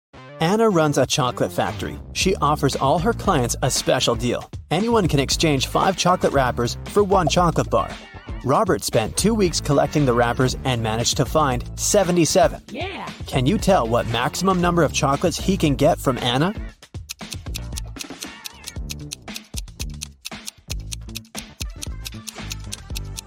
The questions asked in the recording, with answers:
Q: Can you tell what maximum number of chocolates he can get from Anna?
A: Robert can get a total of 19 chocolates.